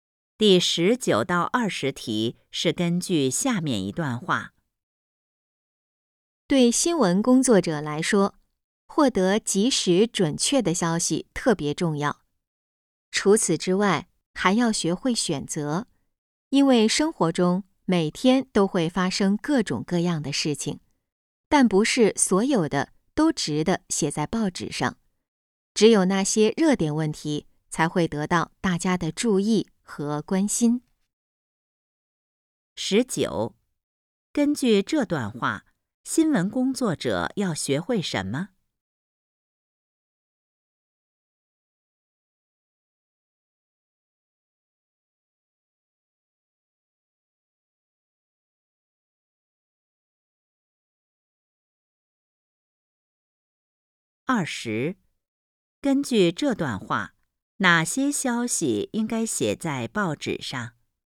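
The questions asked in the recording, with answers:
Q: 十九,根据这段话,新闻工作者要学会什么?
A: 学会选择

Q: 二十,根据这段话,哪些消息应该写在报纸上?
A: 热点问题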